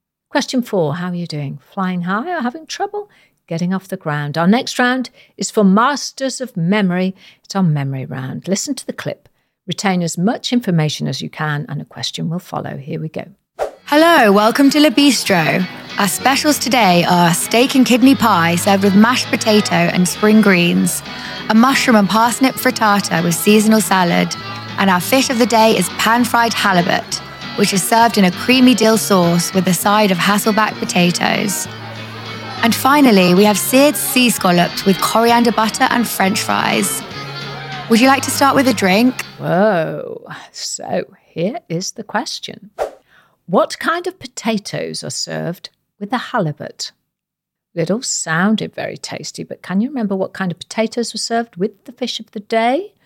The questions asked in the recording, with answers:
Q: What kind of potatoes are served with the halibut?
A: the answer is Hasselback potatoes.